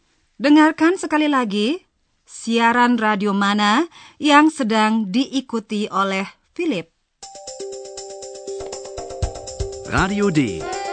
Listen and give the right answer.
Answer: Itulah tadi siaran Radio D